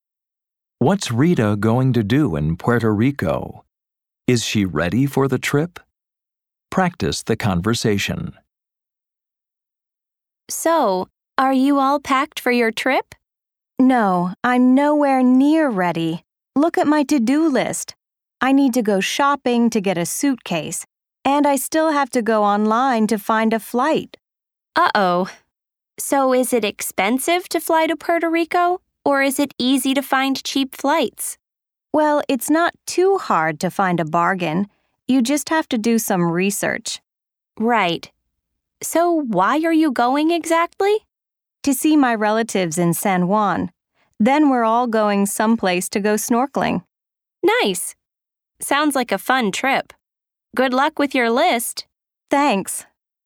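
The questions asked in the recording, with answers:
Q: What's Rita going to do in Puerto Rico?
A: See her relatives in San Juan and go snorkeling

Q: Is she ready for the trip?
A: No, she's nowhere near ready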